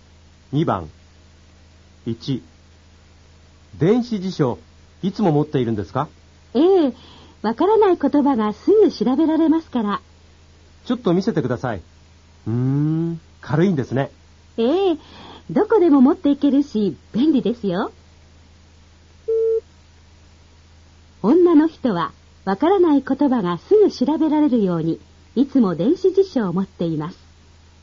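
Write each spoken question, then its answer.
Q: 女の人はわからない言葉がすぐ調べられるようにいつも電子辞書を持っています。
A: 正しい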